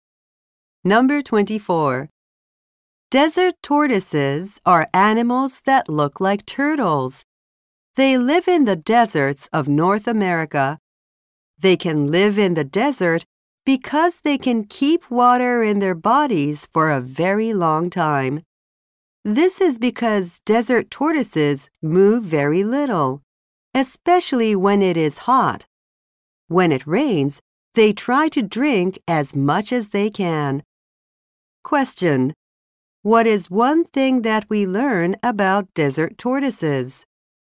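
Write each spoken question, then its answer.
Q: What is one thing that we learn about desert tortoises?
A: They can keep water in their bodies for a very long time.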